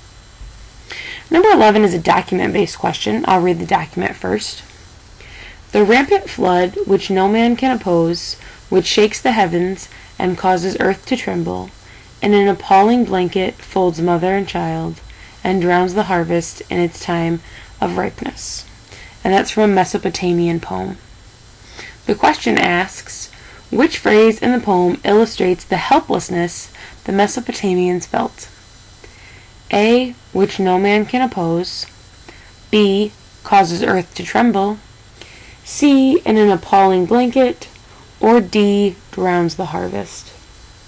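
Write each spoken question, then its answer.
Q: The question asks, which phrase in the poem illustrates the helplessness the Mesopotamians felt?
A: A: which no man can oppose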